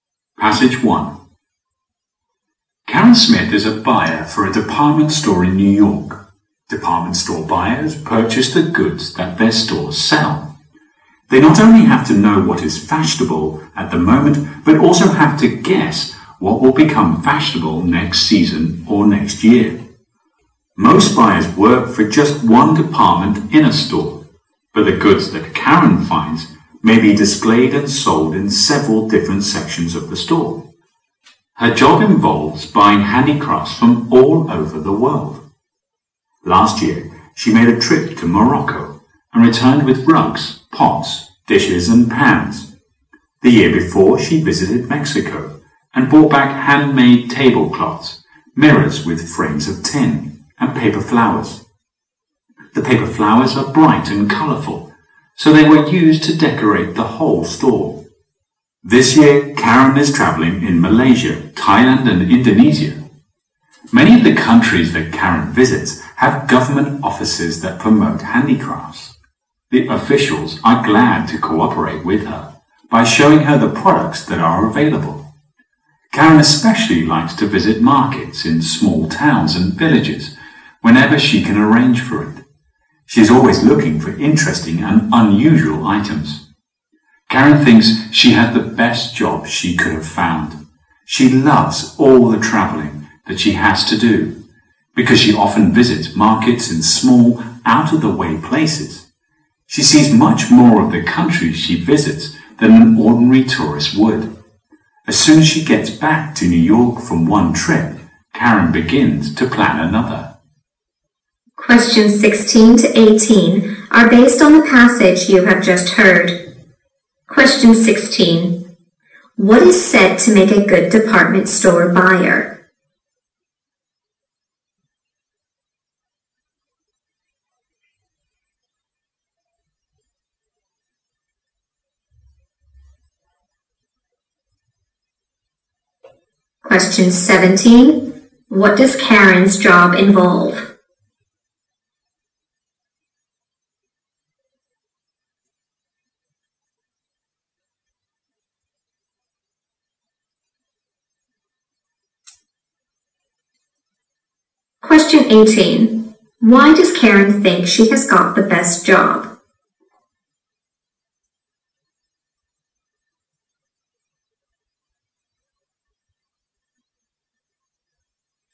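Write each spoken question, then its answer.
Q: What is said to make a good department store buyer?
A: Knowing what is in fashion now and guessing what will be in fashion next

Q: What does Karen's job involve?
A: Buying handicrafts from all over the world

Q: Why does Karen think she has got the best job?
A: She loves traveling and visiting markets in out-of-the-way places.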